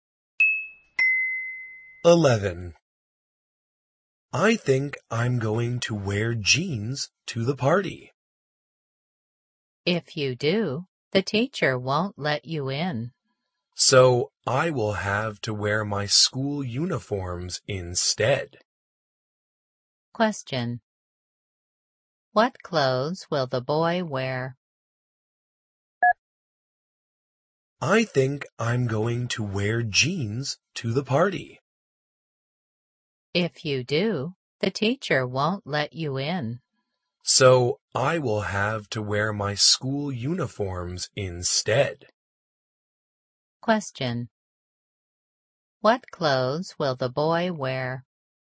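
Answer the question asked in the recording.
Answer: His school uniform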